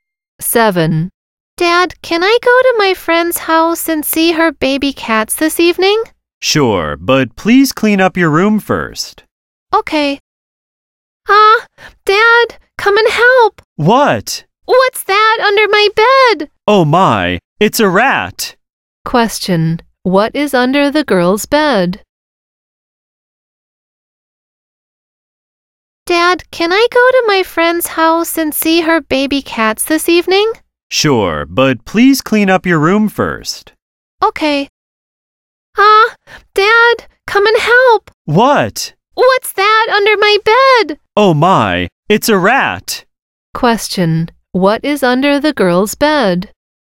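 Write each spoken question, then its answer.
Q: what is under the girl's bed?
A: A rat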